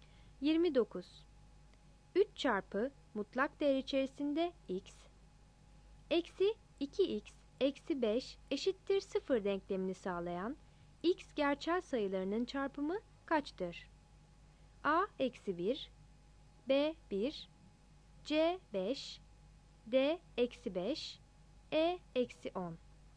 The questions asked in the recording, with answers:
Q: 3 çarpı mutlak değer içerisinde x, eksi 2x eksi 5 eşittir 0 denklemini sağlayan x gerçel sayılarının çarpımı kaçtır?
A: 29 D